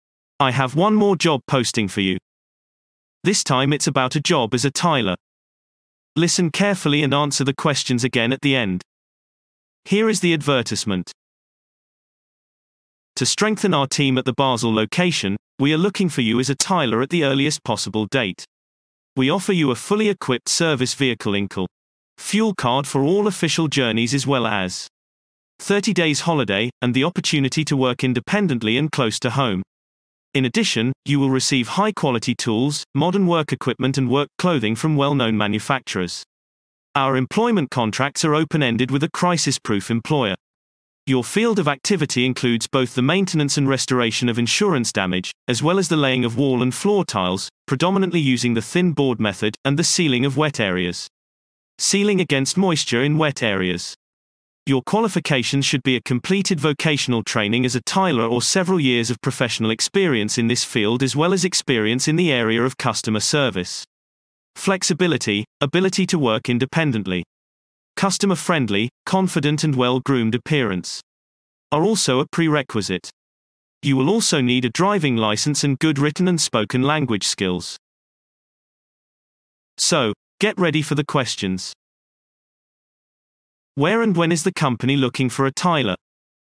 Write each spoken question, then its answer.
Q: Where and when is the company looking for a tiler?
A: Response. The company is looking for a tiler at the Basel location with immediate effect.